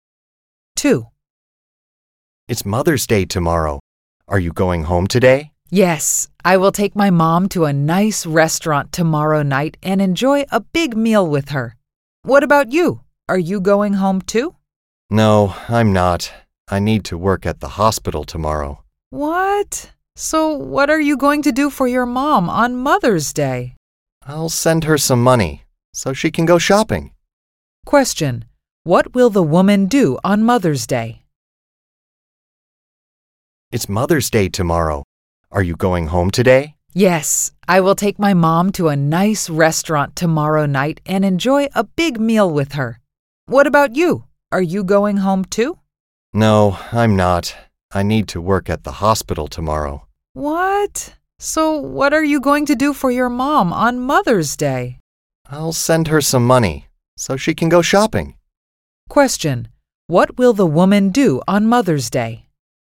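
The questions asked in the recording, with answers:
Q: What will the woman do on Mother's Day?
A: Work at the hospital and send her mom some money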